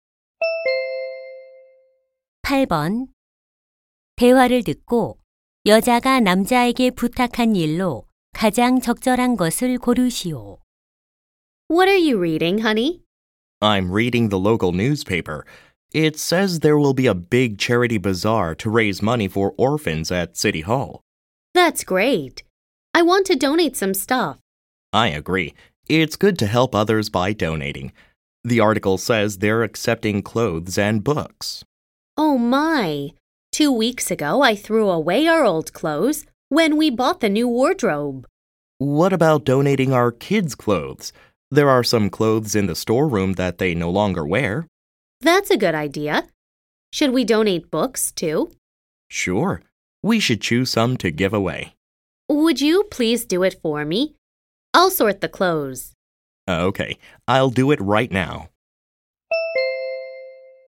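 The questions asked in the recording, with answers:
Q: 대화를듣고여자가남자에게부탁한일로가장적절한것을고르시오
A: 기부할 책 고르기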